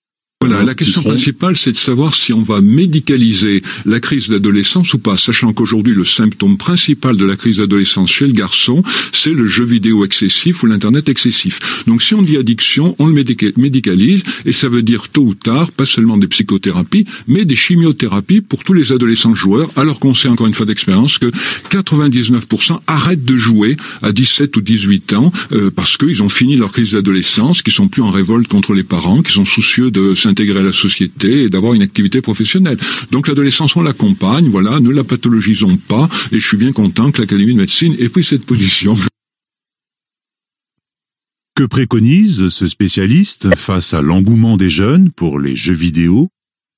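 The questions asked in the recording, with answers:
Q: Que préconise ce spécialiste face à l'engouement des jeunes pour les jeux vidéo ?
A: Accompagner l'adolescence sans la médicaliser ni la pathologiser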